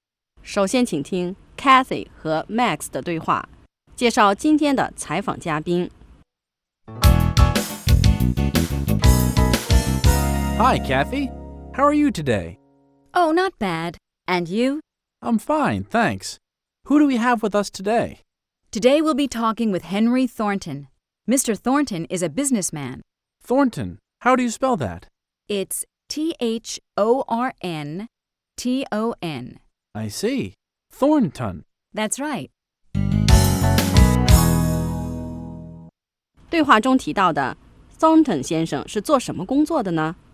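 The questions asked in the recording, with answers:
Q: 对话中提到的 Thornton 先生是做什么工作的呢?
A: 商人(businessman)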